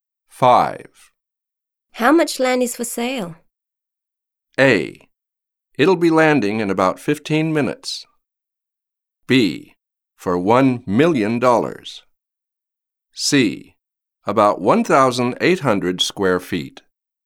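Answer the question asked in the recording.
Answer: C: About 1,800 square feet.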